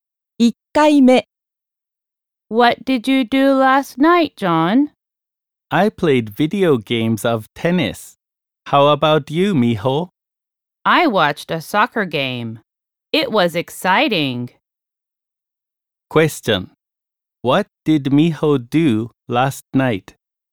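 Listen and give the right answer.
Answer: She watched a soccer game.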